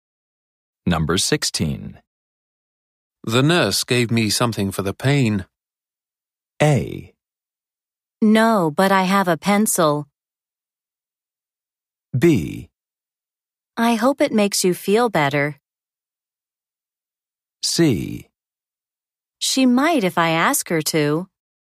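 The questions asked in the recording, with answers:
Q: The nurse gave me something for the pain.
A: B: I hope it makes you feel better.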